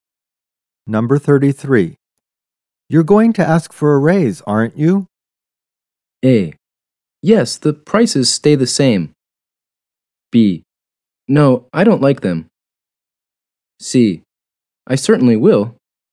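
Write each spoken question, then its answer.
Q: You're going to ask for a raise, aren't you?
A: C: I certainly will.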